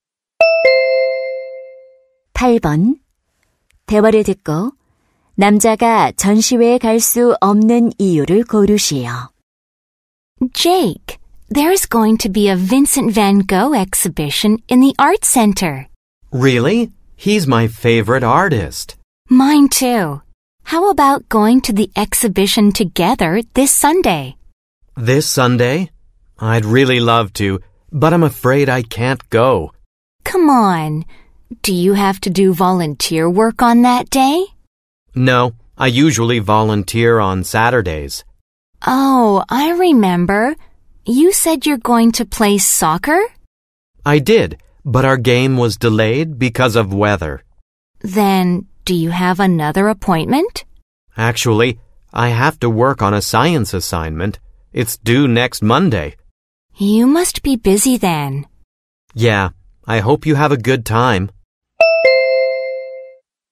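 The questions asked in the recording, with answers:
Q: 대화를 듣고 남자가 전시회에 갈 수 없는 이유를 고르시오.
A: 과학 과제를 해야 해서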